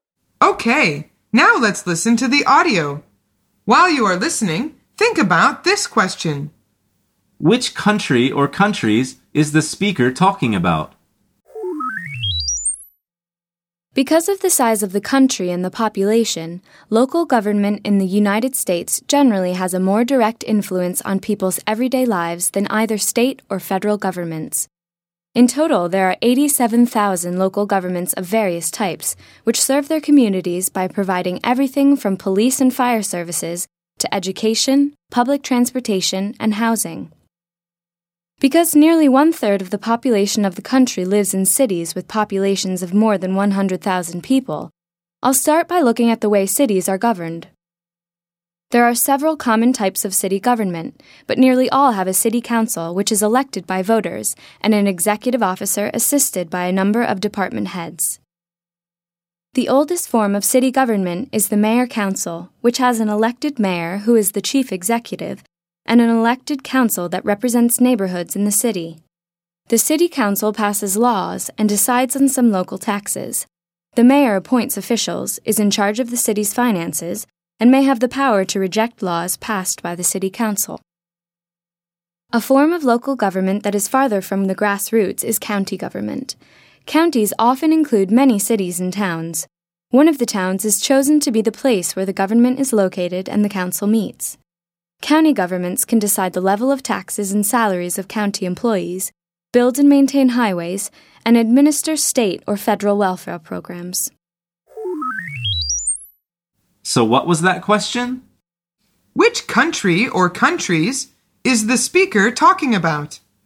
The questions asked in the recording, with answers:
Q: Which country or countries is the speaker talking about?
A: The answer is the U.S.